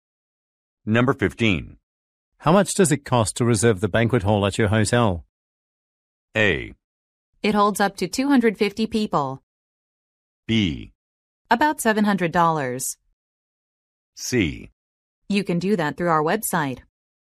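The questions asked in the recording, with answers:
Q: How much does it cost to reserve the banquet hall at your hotel?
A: B: About $700.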